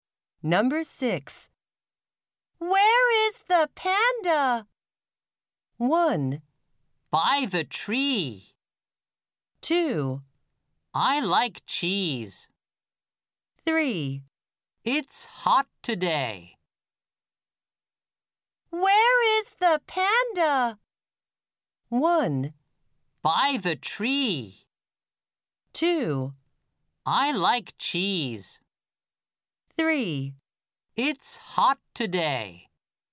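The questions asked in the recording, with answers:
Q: Where is the panda?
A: 1: By the tree.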